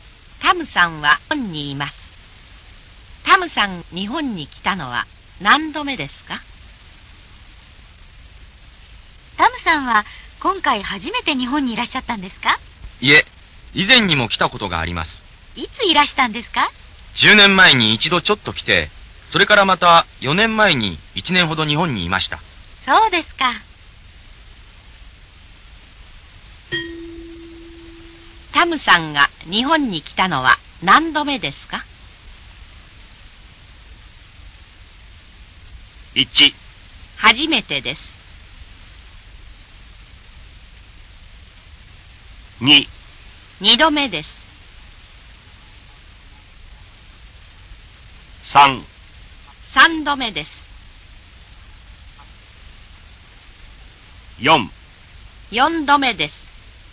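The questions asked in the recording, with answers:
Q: タムさんが日本に来たのは何度目ですか?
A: 3: 3度目です。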